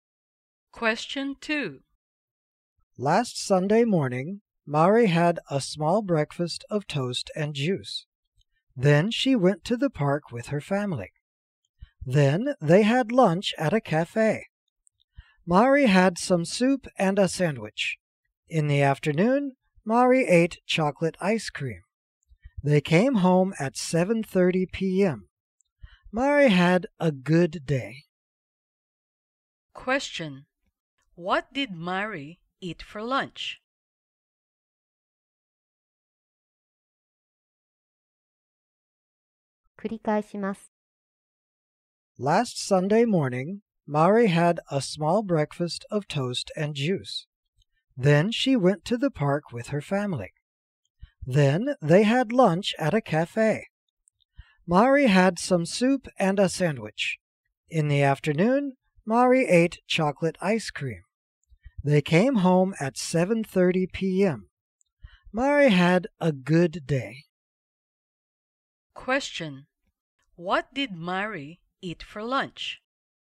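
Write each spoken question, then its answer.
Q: What did Mari eat for lunch?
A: Some soup and a sandwich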